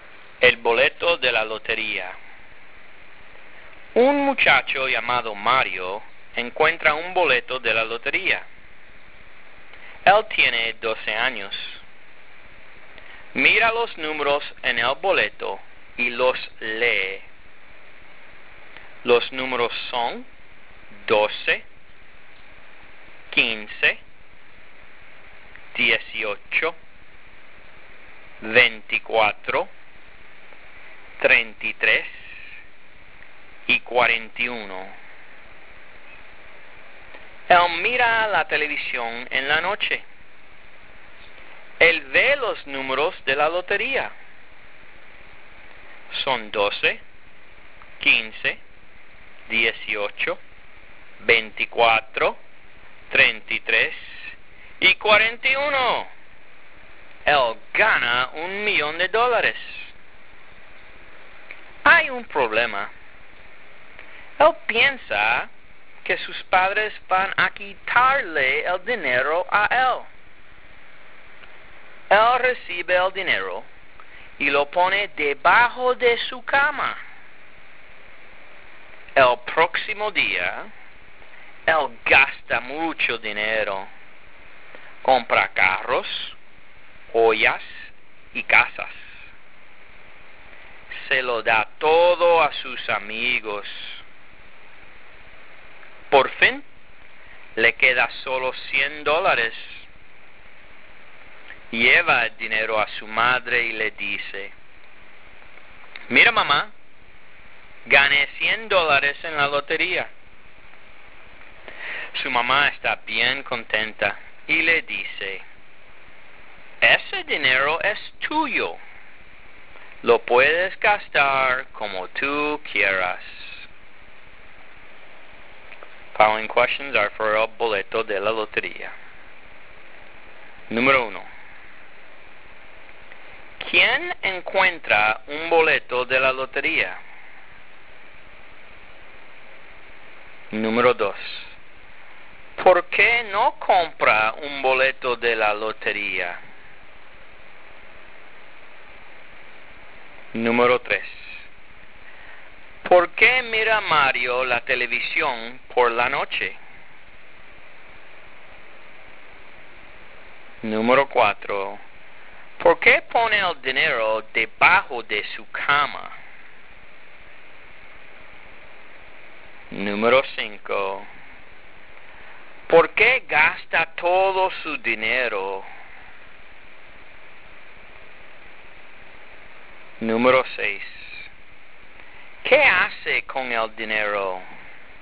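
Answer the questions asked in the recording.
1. Un muchacho llamado Mario
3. Para ver los números de la lotería
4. Porque piensa que sus padres van a quitarle el dinero
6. Compra carros, joyas y casas y se lo da todo a sus amigos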